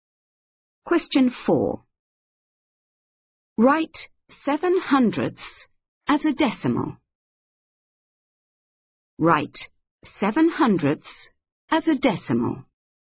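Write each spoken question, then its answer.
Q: Write 7/100 as a decimal.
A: 0.07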